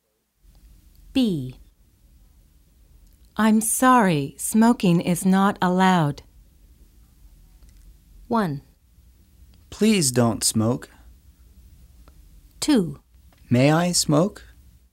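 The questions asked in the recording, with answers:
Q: I'm sorry, smoking is not allowed.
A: 2: May I smoke?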